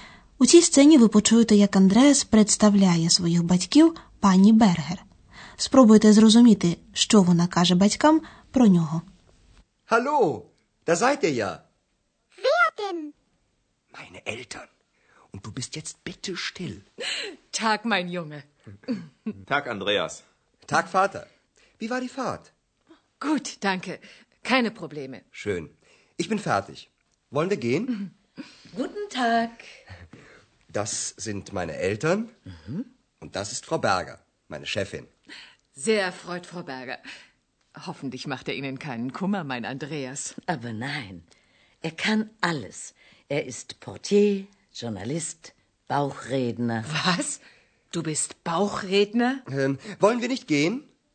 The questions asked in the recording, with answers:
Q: Спробуйте зрозуміти, що вона каже батькам про нього.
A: Мабуть, ви зрозуміли, що пані Бергер похвалила Андреаса, адже він так багато чого вміє.